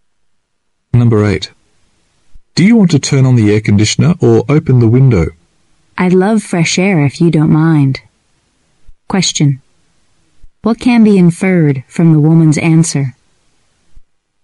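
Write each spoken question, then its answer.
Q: What can be inferred from the woman's answer?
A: She would prefer to open the window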